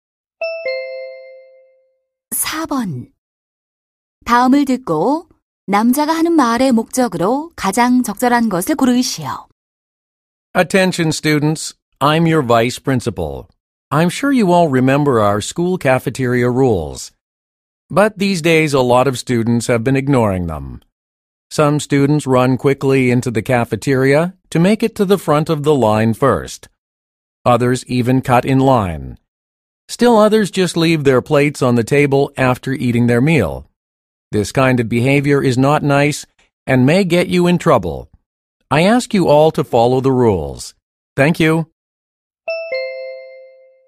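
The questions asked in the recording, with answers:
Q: 다음을 듣고 남자가 하는 말의 목적으로 가장 적절한 것을 고르시오.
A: 학생들에게 학교 식당 규칙을 지킬 것을 당부하려고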